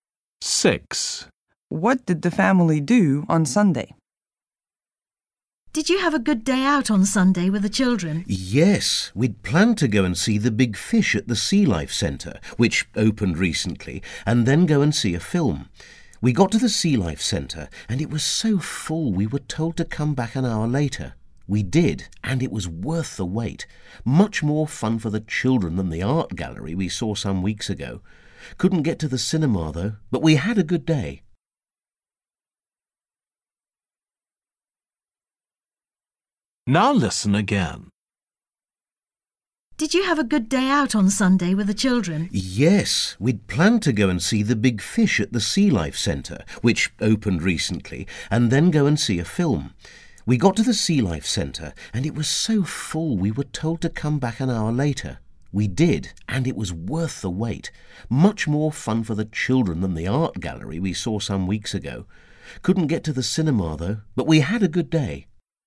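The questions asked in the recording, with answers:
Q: What did the family do on Sunday?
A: visited the Sea Life Centre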